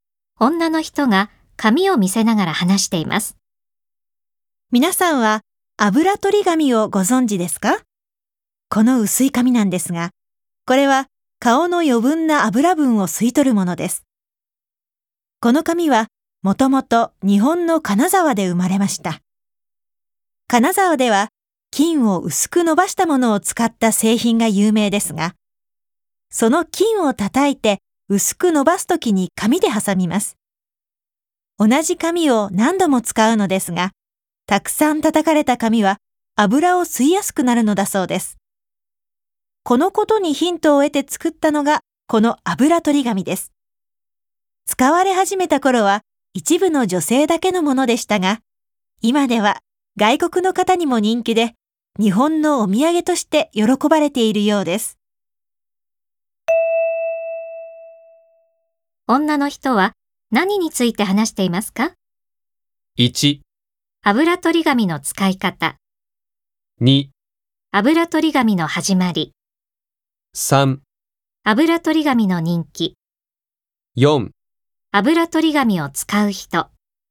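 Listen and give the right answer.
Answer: 2: 油取り紙の始まり。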